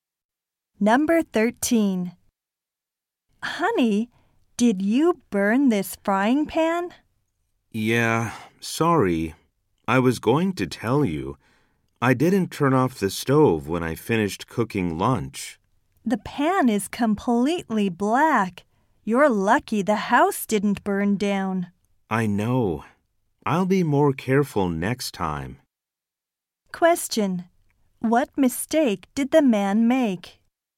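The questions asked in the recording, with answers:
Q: What mistake did the man make?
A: He didn't turn off the stove.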